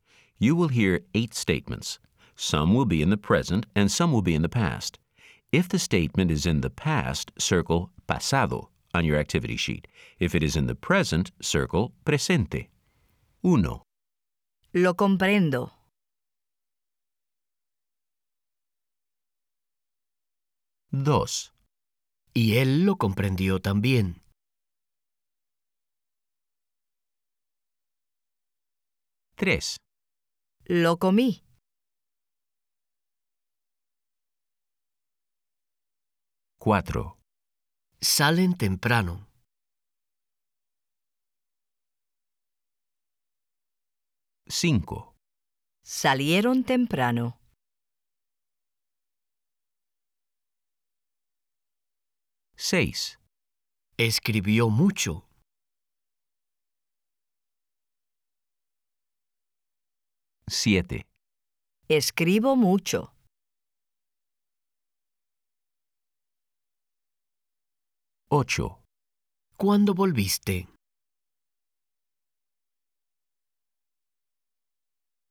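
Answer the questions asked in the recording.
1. presente
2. pasado
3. pasado
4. presente
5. pasado
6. pasado
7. presente
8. pasado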